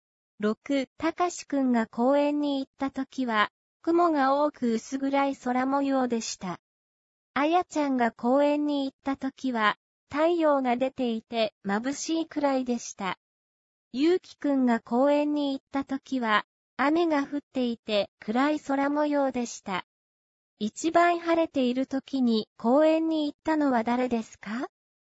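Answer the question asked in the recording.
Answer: あやちゃん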